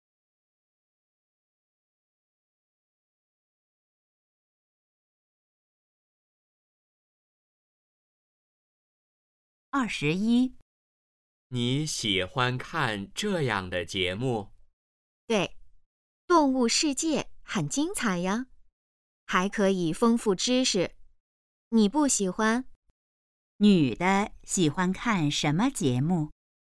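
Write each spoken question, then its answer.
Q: 女的喜欢看什么节目?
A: 动物世界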